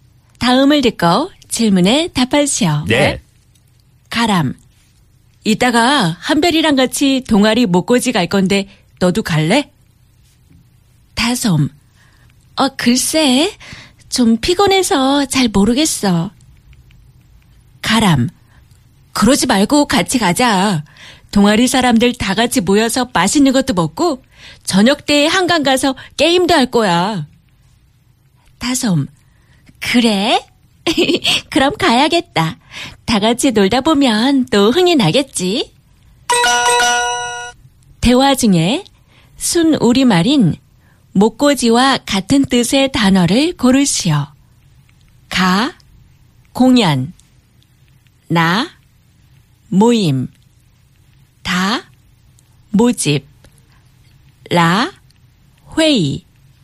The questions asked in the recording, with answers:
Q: 대화 중에 순우리말인 목고지와 같은 뜻의 단어를 고르시오.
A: It's 나, a gathering, a friendly gathering happening.